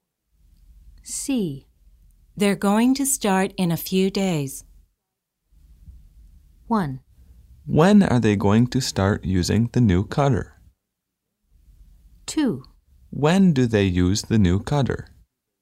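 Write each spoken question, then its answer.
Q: They're going to start in a few days.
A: 1: When are they going to start using the new cutter?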